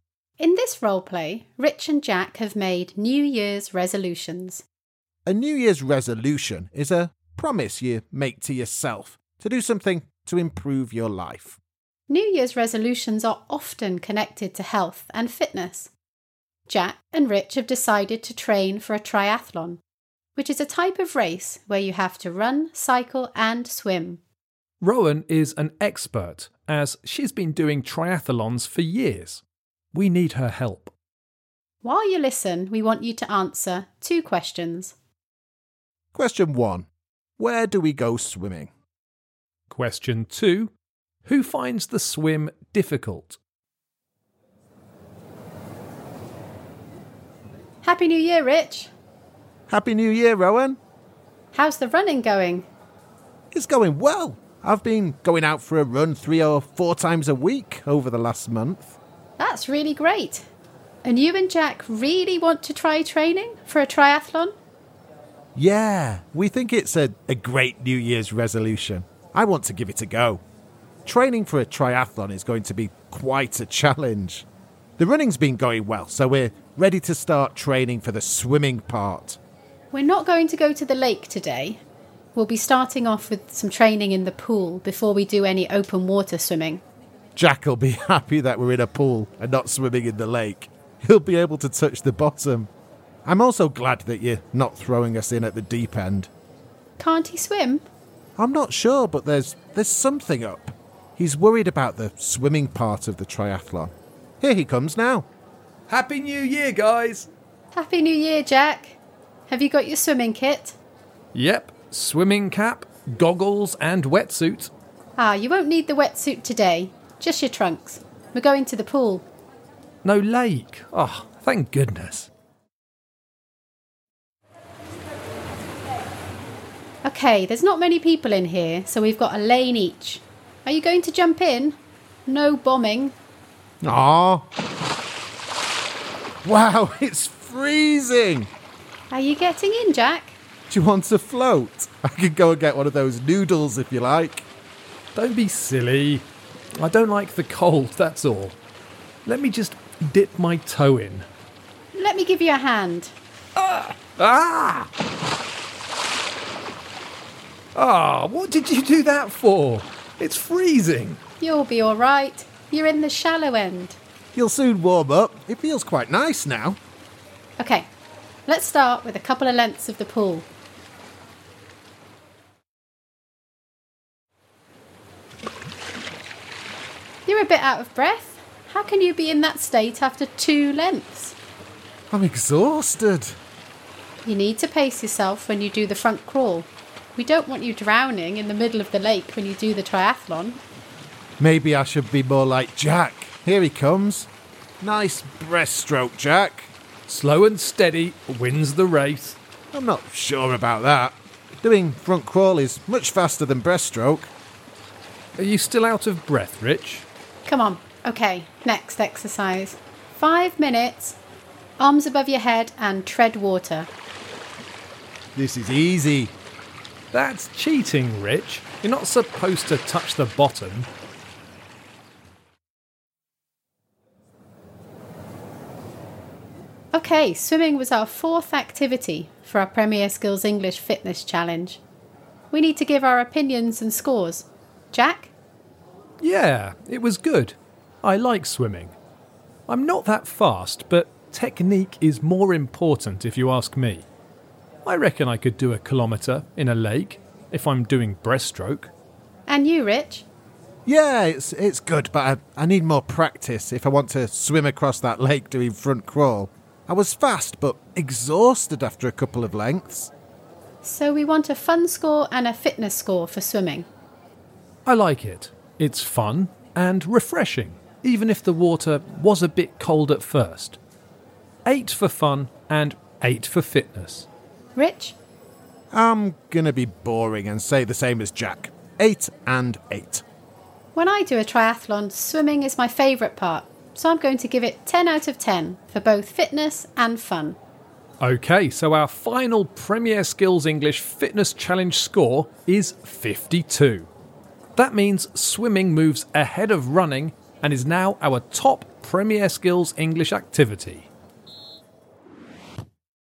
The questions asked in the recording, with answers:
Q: Question one, where do we go swimming?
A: The answer was the swimming pool.

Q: Question two, who finds the swim difficult?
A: So the answer is Rich, because he swam too fast and was very tired after only a short swim.